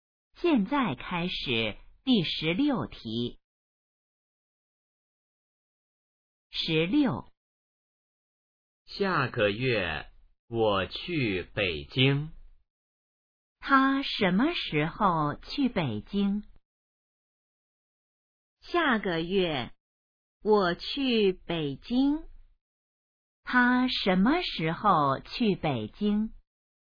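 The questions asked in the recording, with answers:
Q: 他什么时候去北京?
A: 下个月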